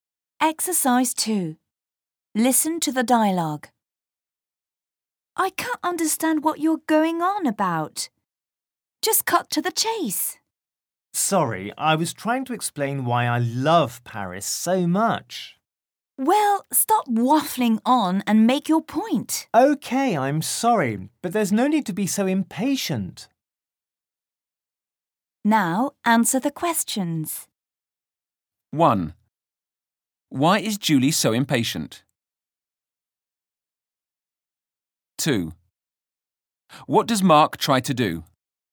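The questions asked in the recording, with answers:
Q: Why is Julie so impatient?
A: Because she can't understand what he's going on about; he is waffling on instead of making his point

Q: What does Mark try to do?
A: He tries to explain why he loves Paris so much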